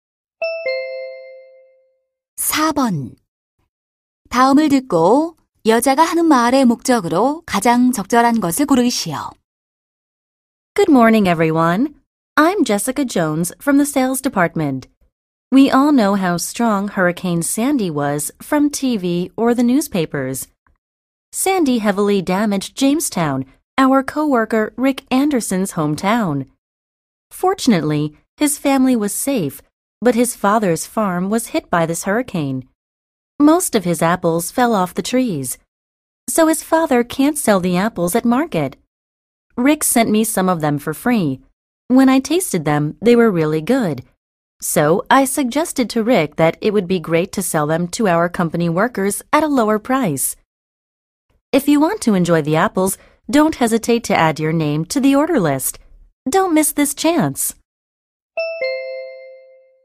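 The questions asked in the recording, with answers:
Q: 다음을 듣고 여자가 하는 말의 목적으로 가장 적절한 것을 고르시오.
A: 태풍 피해를 입은 동료 가족 농장의 사과 구매를 권유하려고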